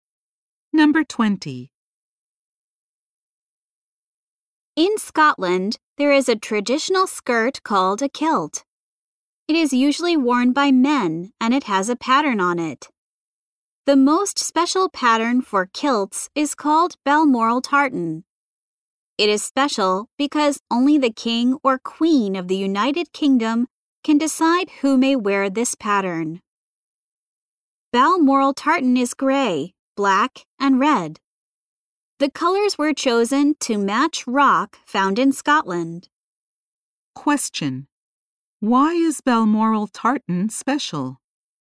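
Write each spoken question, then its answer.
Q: why is Balmoral tartan special?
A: Only the king or queen of the UK can decide who may wear it.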